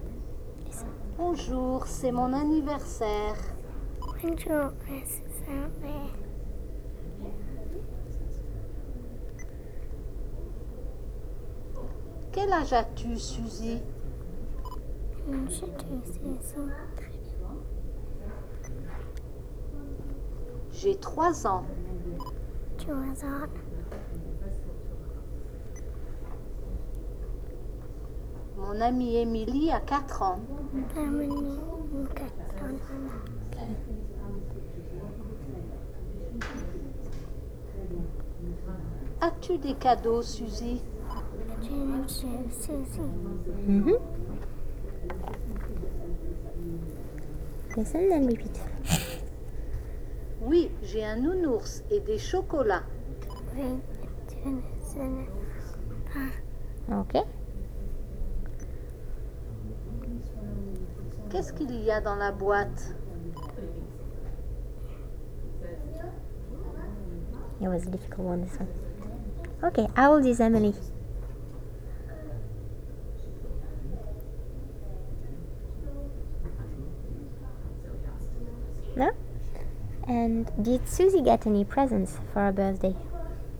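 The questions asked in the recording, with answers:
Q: Okay, how old is Emily?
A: 4 years old

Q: And did Suzy get any presents for her birthday?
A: Yes, a teddy bear and chocolates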